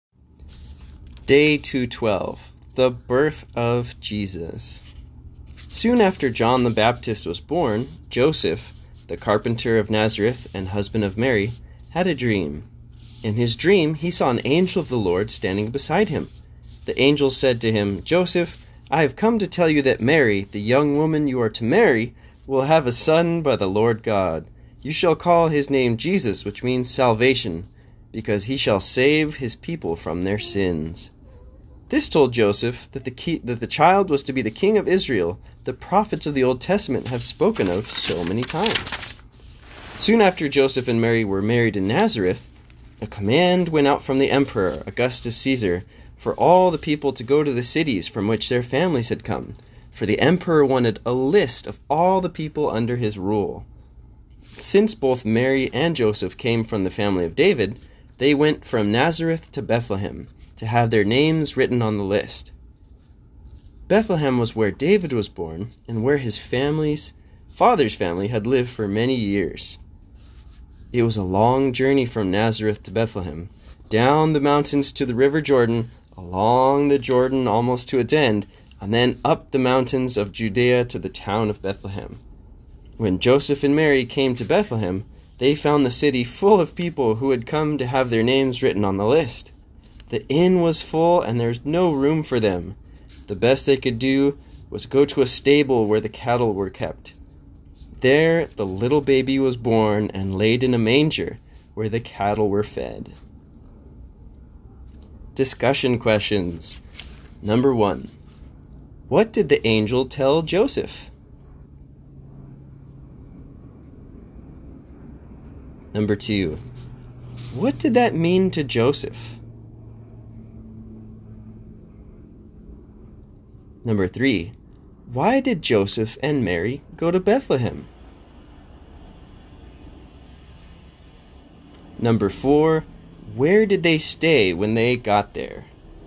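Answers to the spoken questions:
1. That Mary would have a son by the Lord God, to be named Jesus
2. That the child was to be the king of Israel spoken of by the prophets
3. To have their names written on the emperor's list, since they came from David's family
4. In a stable where the cattle were kept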